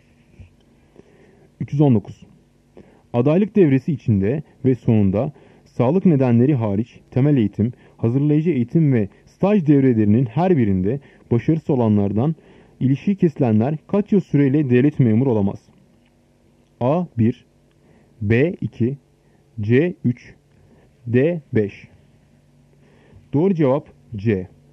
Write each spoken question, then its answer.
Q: Adaylık devresi içinde ve sonunda sağlık nedenleri hariç temel eğitim, hazırlayıcı eğitim ve staj devrelerinin her birinde başarısız olanlardan ilişiği kesilenler kaç yıl süreyle devlet memuru olamaz?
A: Doğru cevap C. 3.